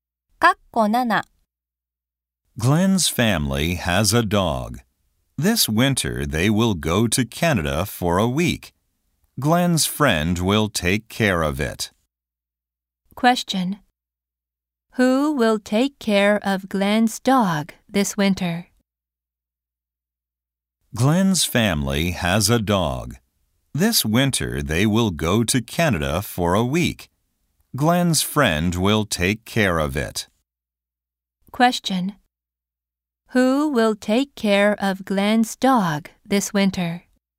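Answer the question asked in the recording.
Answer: Glenn's friend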